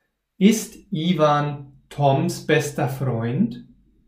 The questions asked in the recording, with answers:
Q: Ist Ivan Toms bester Freund?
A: Ja, das stimmt. Ivan ist Toms bester Freund.